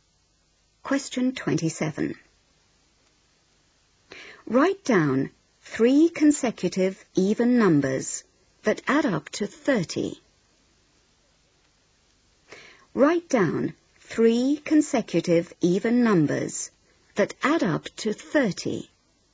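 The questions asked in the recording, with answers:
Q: Write down three consecutive even numbers that add up to 30.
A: 8, 10, 12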